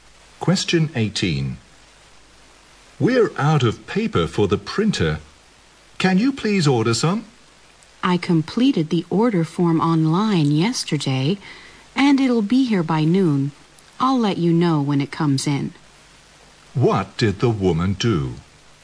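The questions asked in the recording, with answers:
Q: What did the woman do?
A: She ordered printer paper online yesterday.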